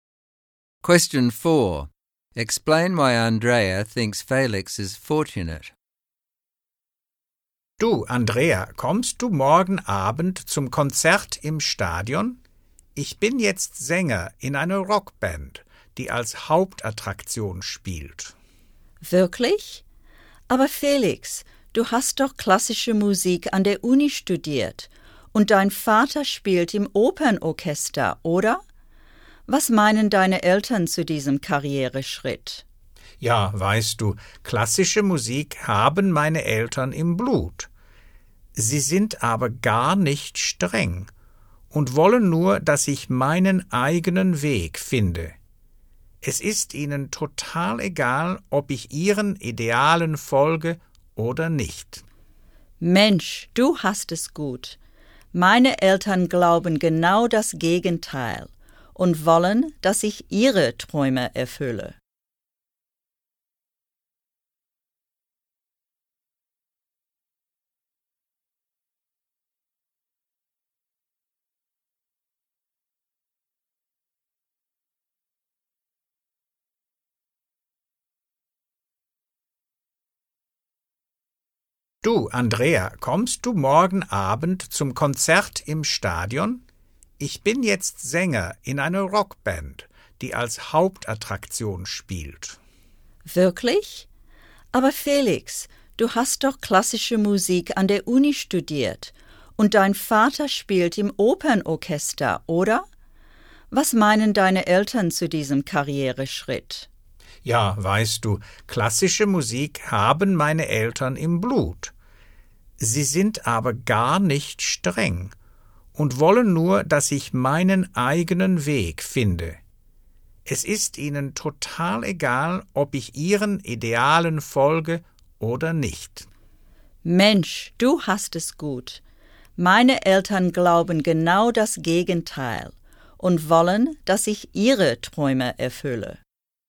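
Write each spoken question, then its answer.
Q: Explain why Andrea thinks Felix is fortunate.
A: His parents are not strict and let him find his own way, even though he has left classical music. Her parents want her to fulfil their dreams.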